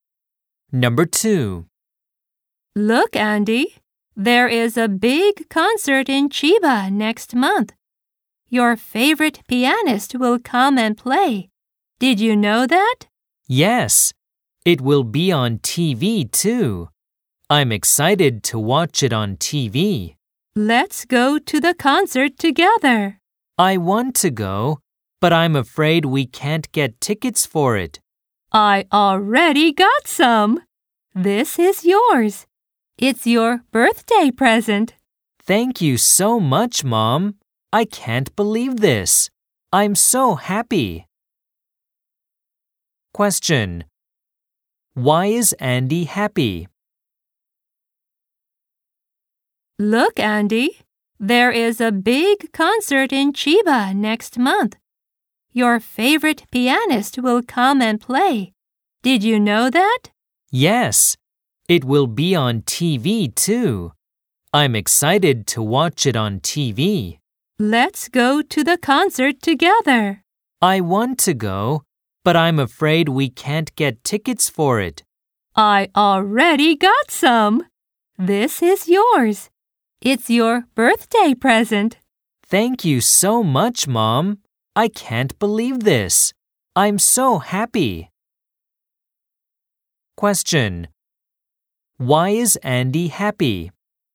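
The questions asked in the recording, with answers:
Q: Why is Andy happy?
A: His mother gave him a ticket to the concert as a birthday present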